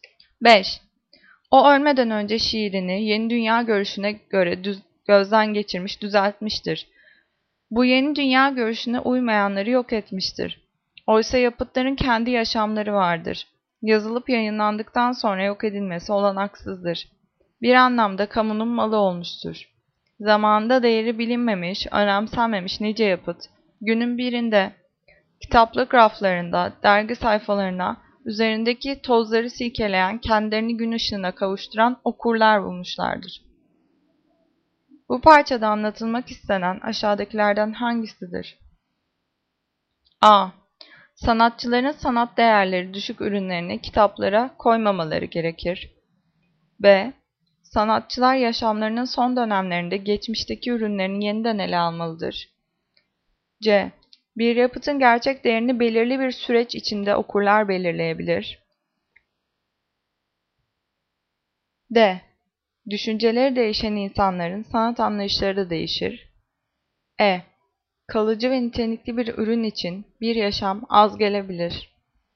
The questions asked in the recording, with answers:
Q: Bu parçada anlatılmak istenen aşağıdakilerden hangisidir?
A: Cevap C. Bir yapıtın gerçek değerini belirli bir süreç içinde okuyucular belirleyebilir.